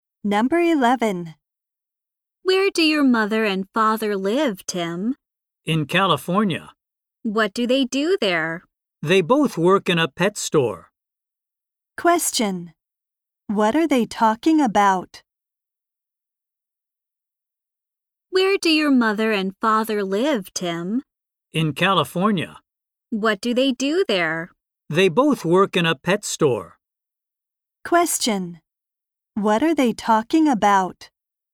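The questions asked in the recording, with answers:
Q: What are they talking about?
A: Tim's parents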